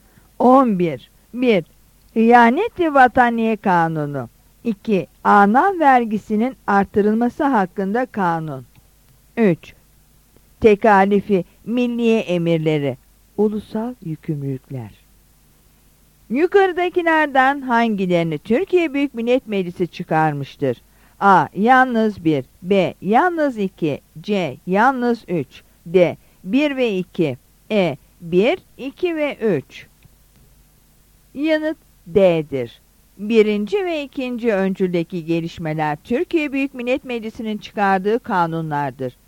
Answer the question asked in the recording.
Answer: Yanıt D'dir.